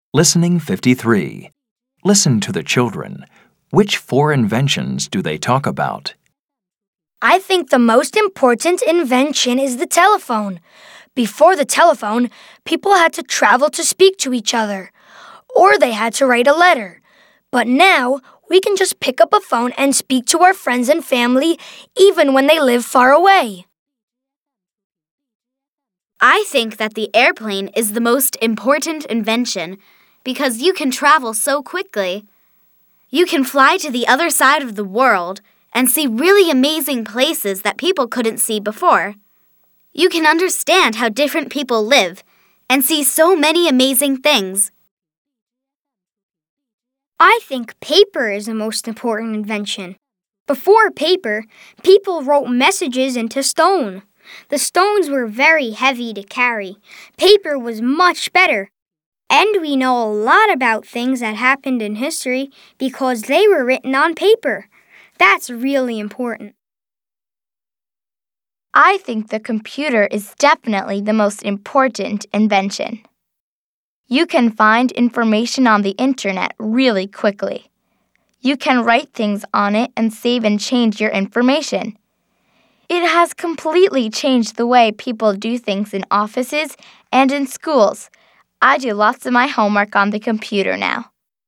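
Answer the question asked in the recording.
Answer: the telephone, the airplane, paper and the computer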